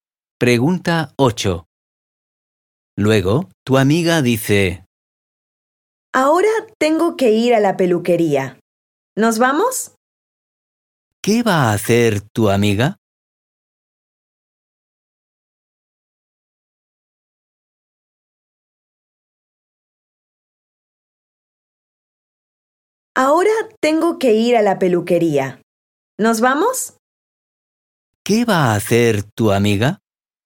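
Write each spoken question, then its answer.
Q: ¿Qué va a hacer tu amiga?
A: ir a la peluquería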